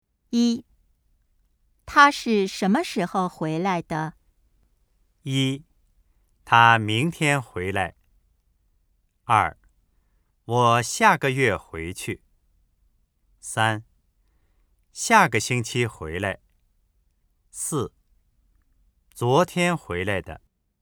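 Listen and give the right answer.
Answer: 四: 昨天回来的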